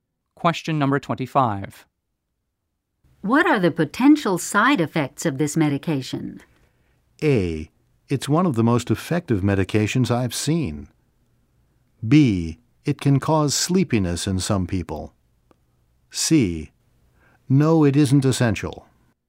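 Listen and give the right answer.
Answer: B: It can cause sleepiness in some people.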